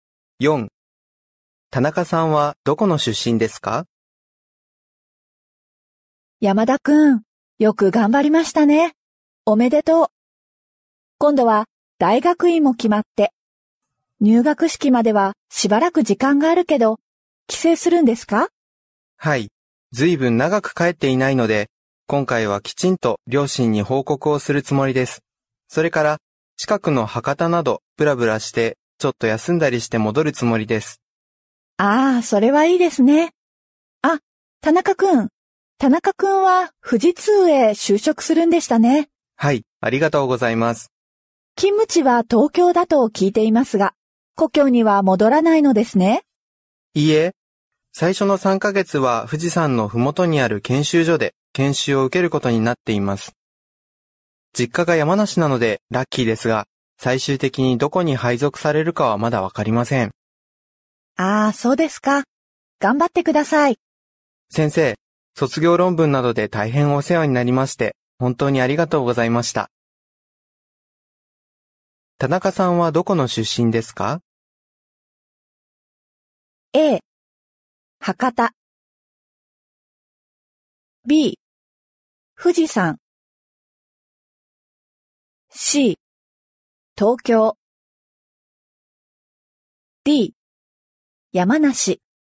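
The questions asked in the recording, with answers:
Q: 田中さんはどこの出身ですか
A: D: 山梨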